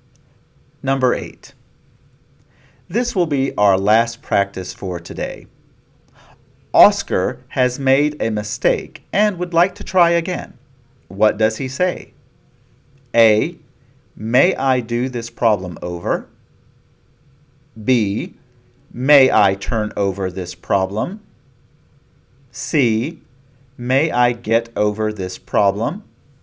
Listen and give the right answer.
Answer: only A, may I do this problem over, communicates what Oscar wants to say.